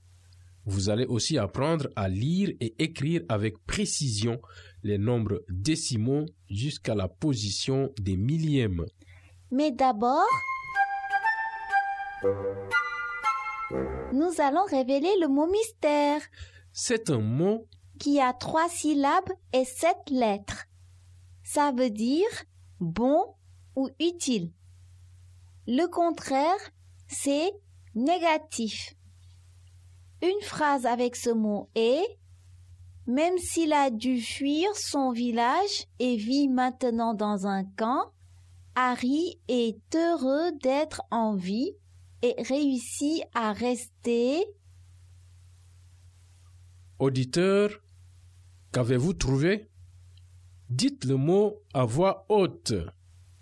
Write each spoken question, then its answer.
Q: Auditeur, qu'avez-vous trouvé?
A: Le mot mystère est « positif ».